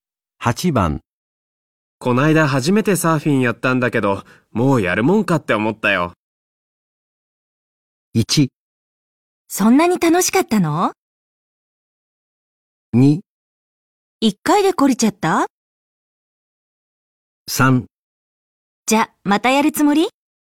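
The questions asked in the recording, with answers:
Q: めてサーフィンやったんだけど、もうやるもんかって思ったよ。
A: 2: 一回で懲りちゃった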